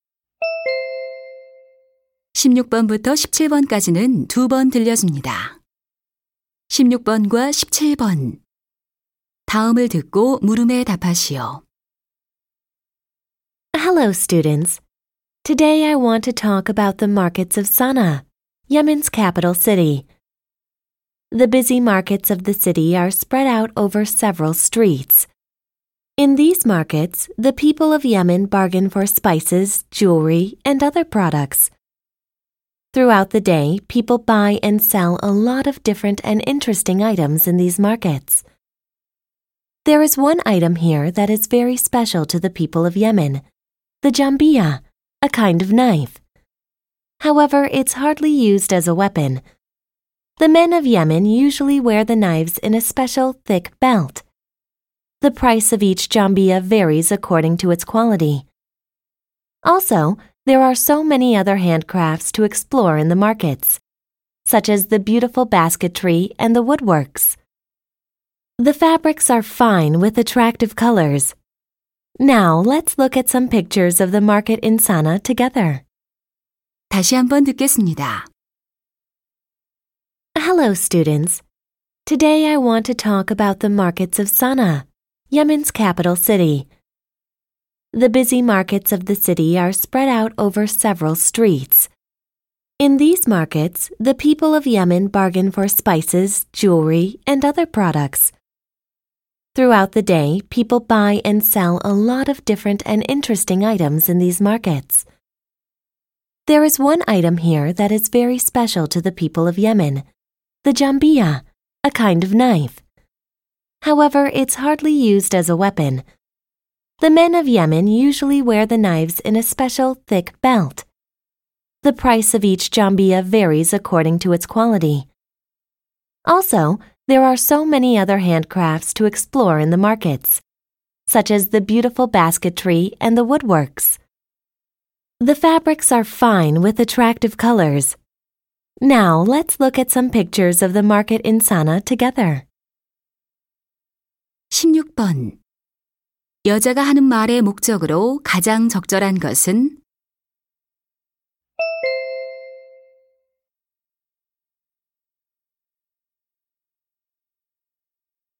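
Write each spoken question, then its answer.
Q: 여자가 하는 말의 목적으로 가장 적절한 것은?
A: 예멘 사나의 시장을 소개하려고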